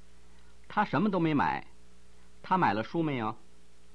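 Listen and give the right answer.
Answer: 没有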